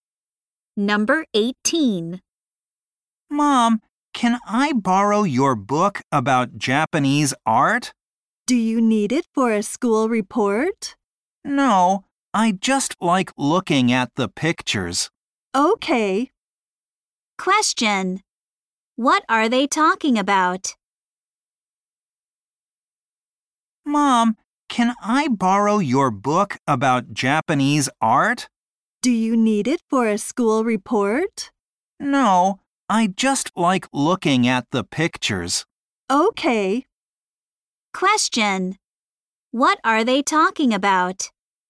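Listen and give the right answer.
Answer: A book about Japanese art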